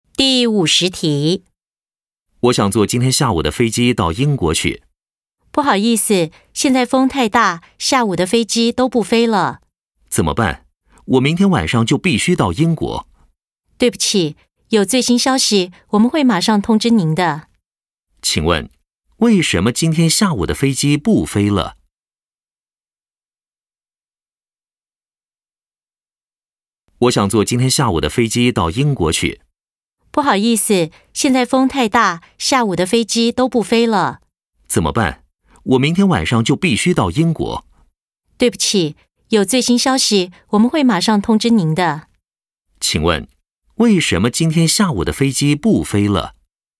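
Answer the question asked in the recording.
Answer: 因为风太大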